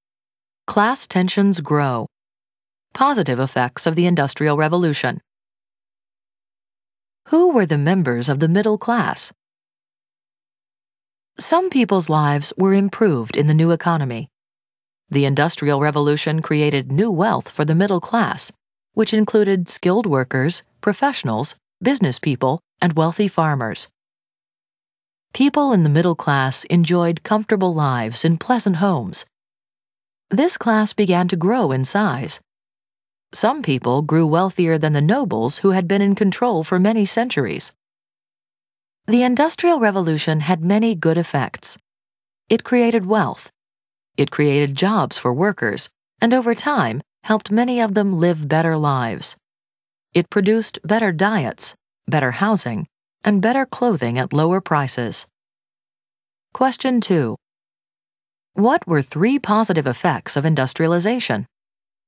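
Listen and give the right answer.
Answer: It created wealth, created jobs, and produced better diets, housing and clothing at lower prices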